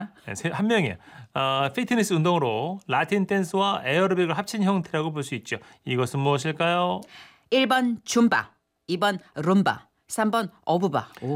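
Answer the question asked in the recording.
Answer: 1번: 줌바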